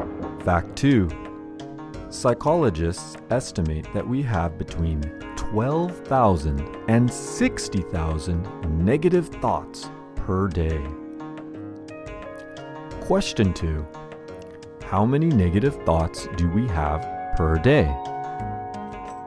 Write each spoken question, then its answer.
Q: How many negative thoughts do we have per day?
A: Yes, psychologists estimate that we have between 12,000 and 60,000 negative thoughts per day.